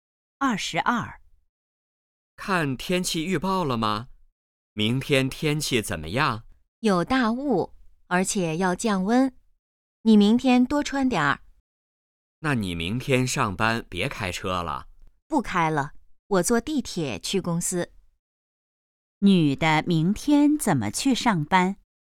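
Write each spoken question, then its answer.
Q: 女的明天怎么去上班?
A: 坐地铁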